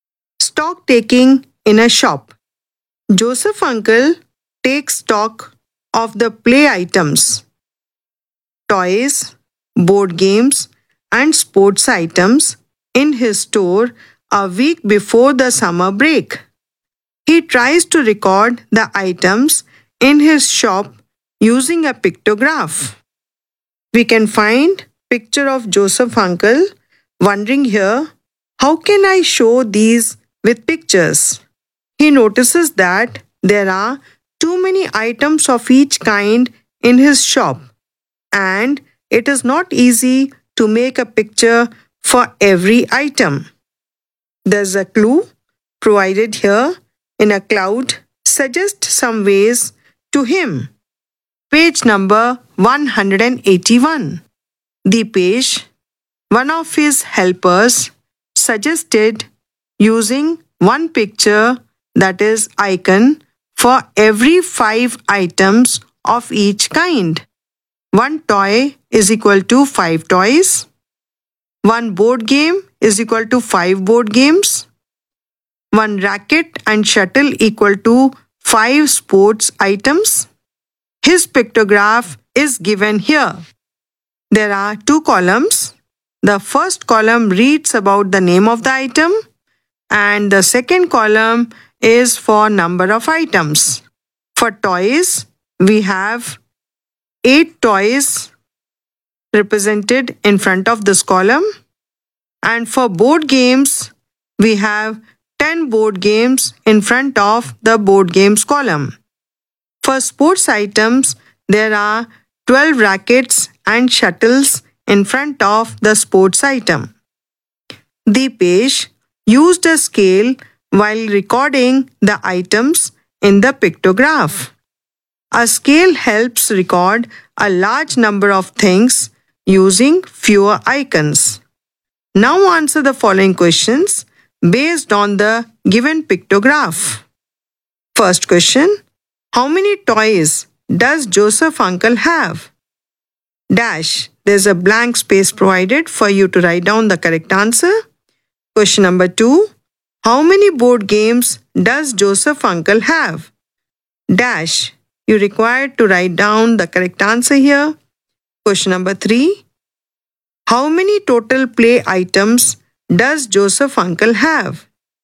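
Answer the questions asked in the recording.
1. 40
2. 50
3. 150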